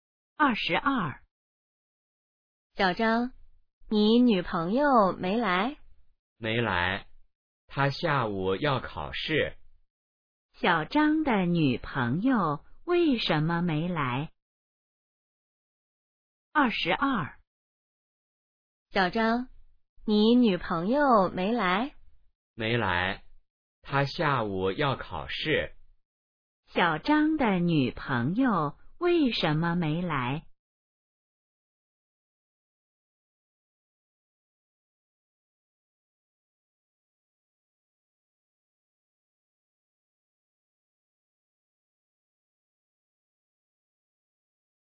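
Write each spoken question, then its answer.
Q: 小张的女朋友为什么没来?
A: 她下午要考试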